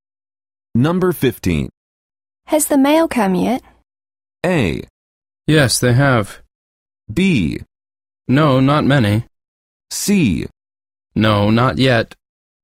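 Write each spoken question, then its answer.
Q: Has the mail come yet?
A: C: No, not yet.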